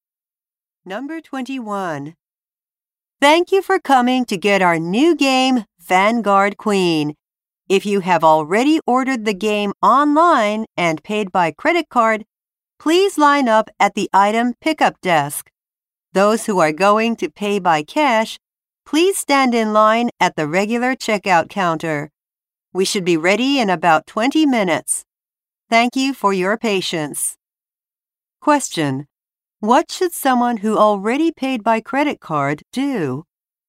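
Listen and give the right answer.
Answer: Line up at the item pickup desk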